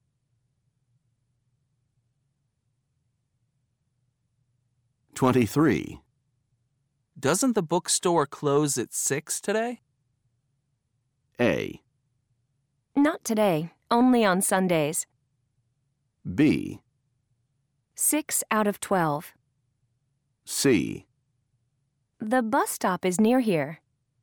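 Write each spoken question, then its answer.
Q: Doesn't the bookstore close at 6 today?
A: A: Not today, only on Sundays.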